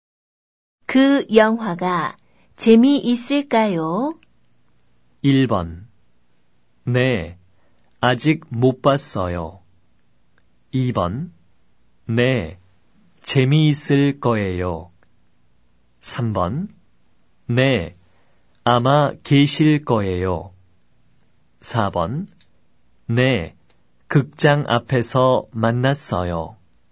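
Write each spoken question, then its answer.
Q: 그 영화가 재미있을까요?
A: 2: 네, 재미있을 거예요.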